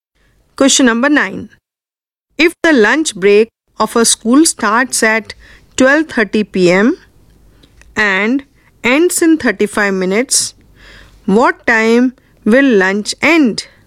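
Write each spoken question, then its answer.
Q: what time will lunch end?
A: 1:05 p.m.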